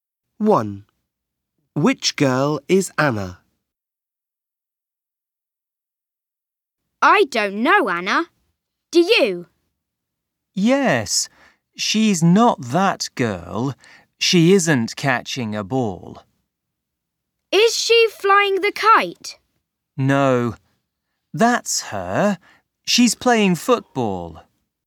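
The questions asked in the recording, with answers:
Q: Which girl is Anna?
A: the girl playing football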